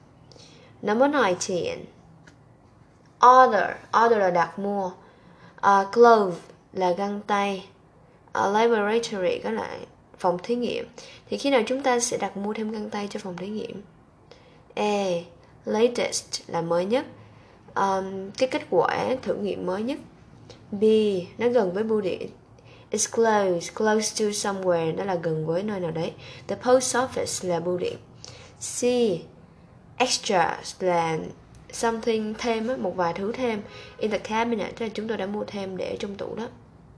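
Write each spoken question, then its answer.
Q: Thì khi nào chúng ta sẽ đặt mua thêm găng tay cho phòng thí nghiệm?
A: C: Chúng tôi đã mua thêm để trong tủ.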